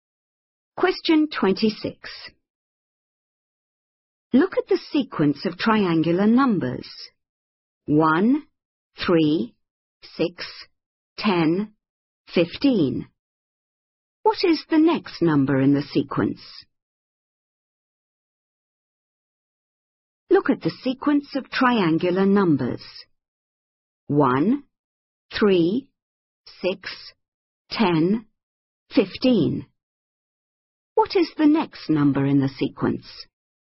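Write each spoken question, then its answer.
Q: What is the next number in the sequence?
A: 21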